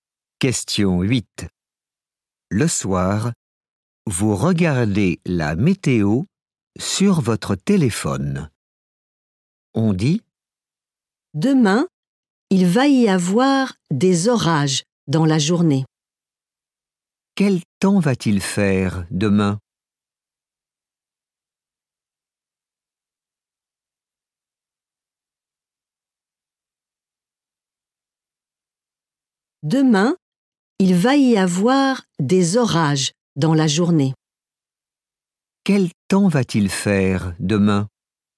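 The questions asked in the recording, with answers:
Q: Quel temps va-t-il faire demain?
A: des orages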